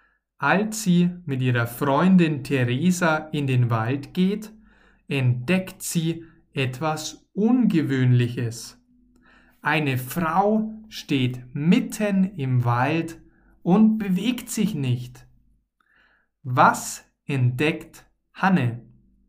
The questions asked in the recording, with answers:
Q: Was entdeckt Hanne?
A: Etwas Ungewöhnliches. Hanne entdeckt etwas Ungewöhnliches.